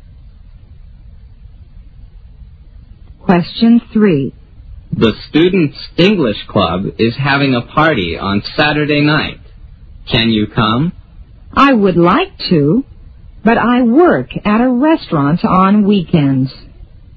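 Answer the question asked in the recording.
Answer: She works at a restaurant on weekends.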